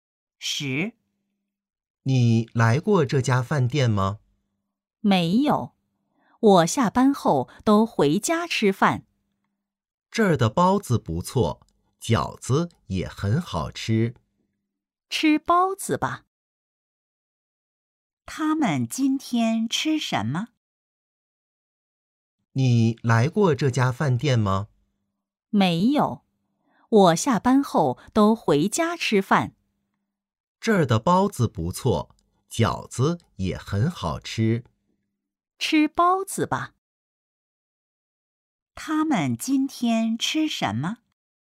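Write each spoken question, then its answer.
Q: 他们今天吃什么?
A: 包子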